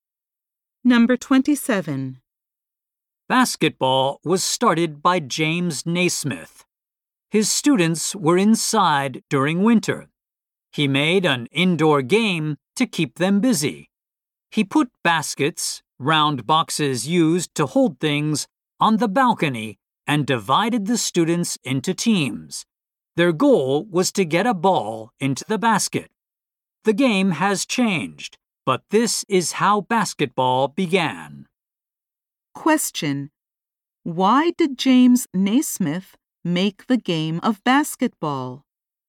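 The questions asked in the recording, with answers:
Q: Why did James Naismith make the game of basketball?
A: To keep his students busy indoors in winter.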